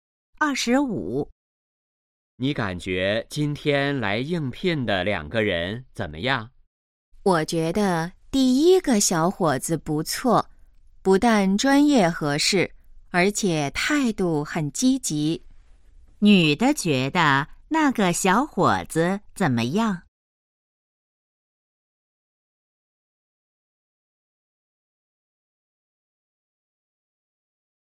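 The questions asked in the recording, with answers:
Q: 女的觉得那个小伙子怎么样?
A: 不错,专业合适,态度积极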